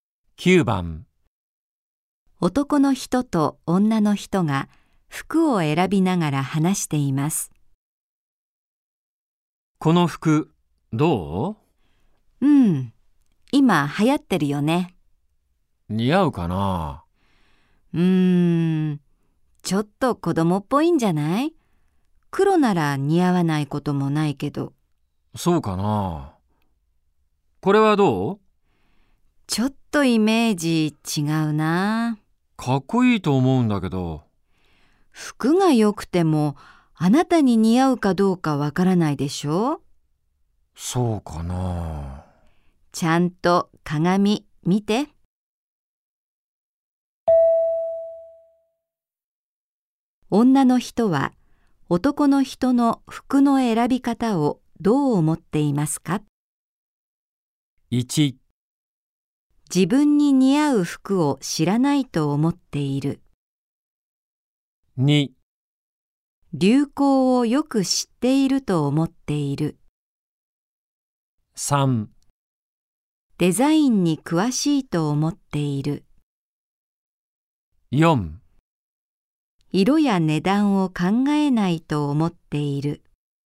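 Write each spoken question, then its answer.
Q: 女の人は男の人の服の選び方をどう思っていますか?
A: 1: 自分に似合う服を知らないと思っている。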